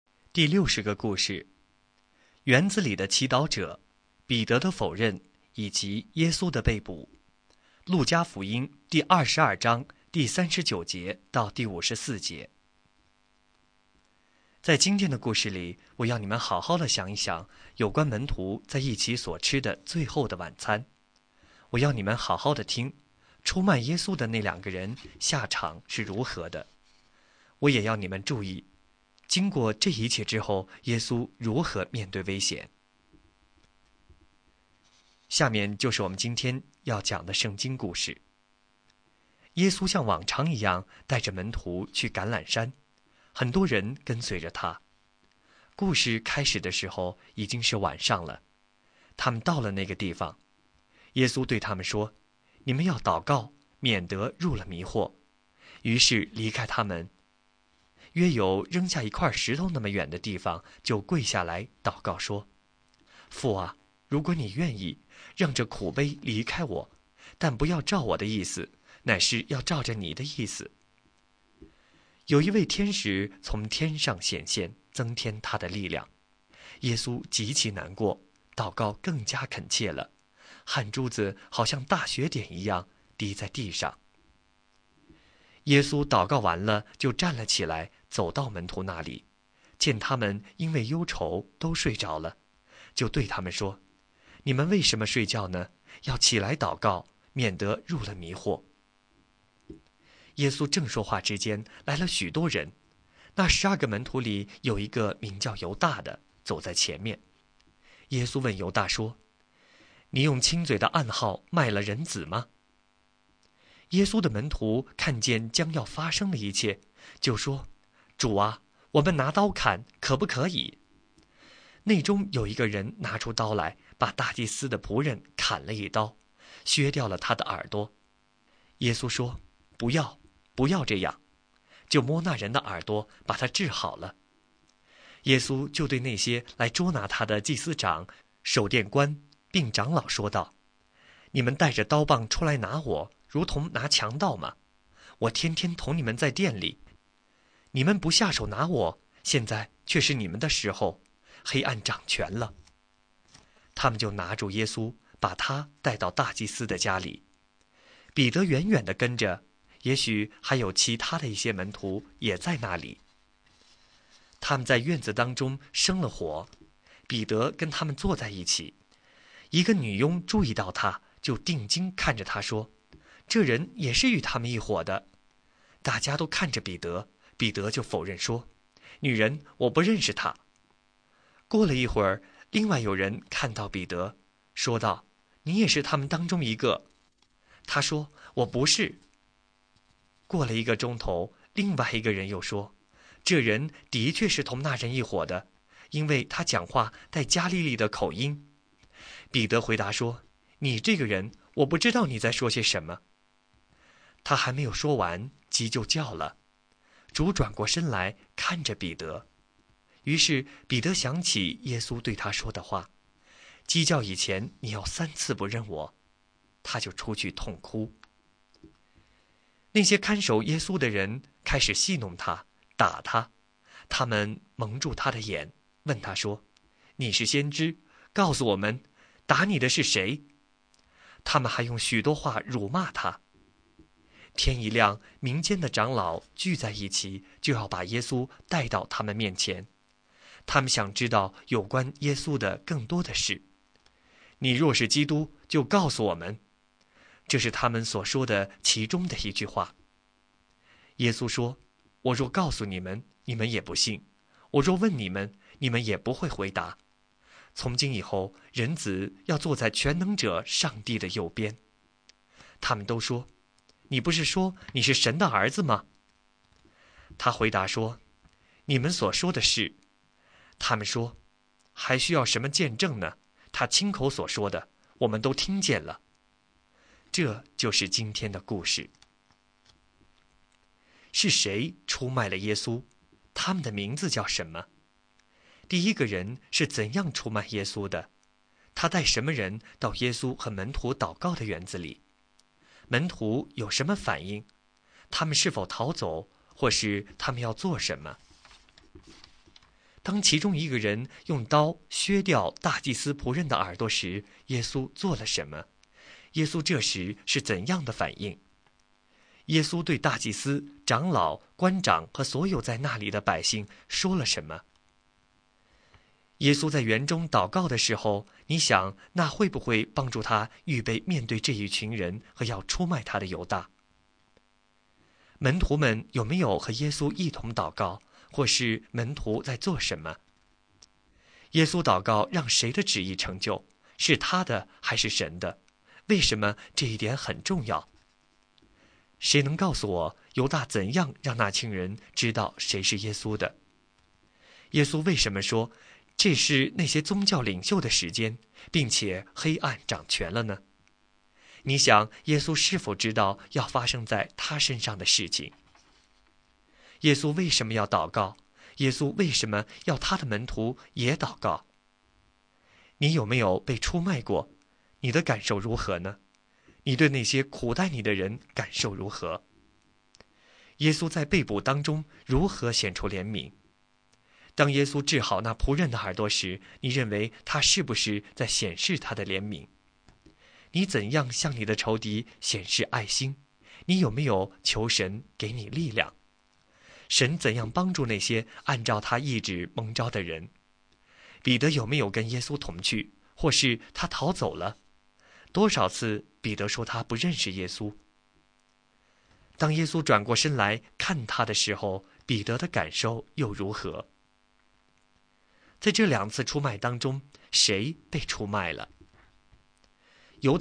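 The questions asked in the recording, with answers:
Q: 是谁出卖了耶稣?他们的名字叫什么?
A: 犹大和彼得

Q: 他带什么人到耶稣和门徒祷告的园子里?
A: 许多人(祭司长、守殿官和长老等)

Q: 当其中一个人用刀削掉大祭司仆人的耳朵时,耶稣做了什么?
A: 摸那人的耳朵,把他治好了

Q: 门徒们有没有和耶稣一同祷告,或是门徒在做什么?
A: 没有,他们因为忧愁都睡着了

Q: 耶稣祷告让谁的旨意成就?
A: 神(父)的旨意

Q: 谁能告诉我,犹大怎样让那群人知道谁是耶稣的?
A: 用亲嘴的暗号

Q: 多少次彼得说他不认识耶稣?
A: 三次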